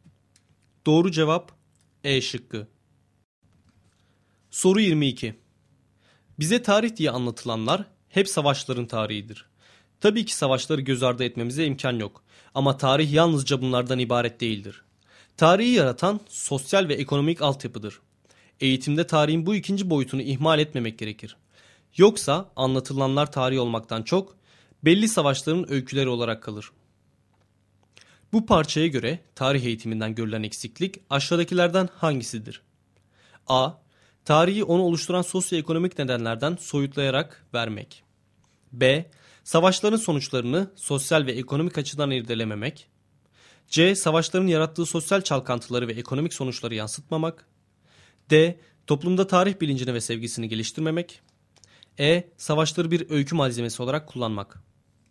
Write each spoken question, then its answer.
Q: Bu parçaya göre tarih eğitiminden görülen eksiklik aşağıdakilerden hangisidir?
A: Doğru cevap A şıkkı.